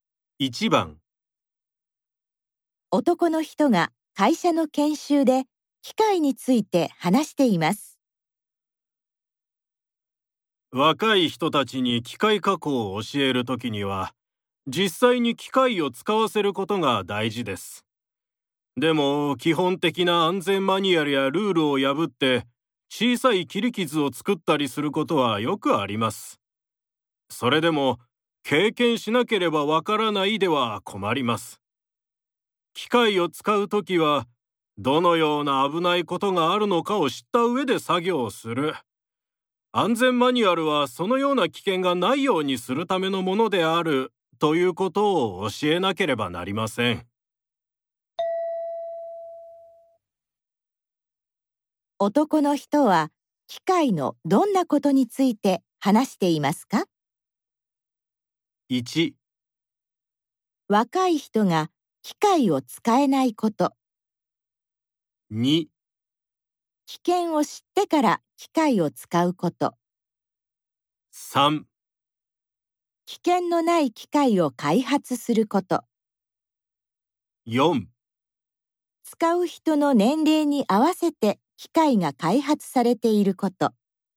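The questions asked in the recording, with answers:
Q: 男の人は機械のどんなことについて話していますか?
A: 2: 危険を知ってから機械を使うこと。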